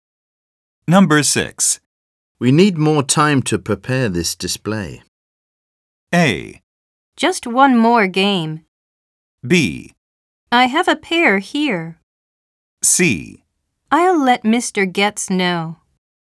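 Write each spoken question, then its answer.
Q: We need more time to prepare this display.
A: C: I'll let Mr. Getz know.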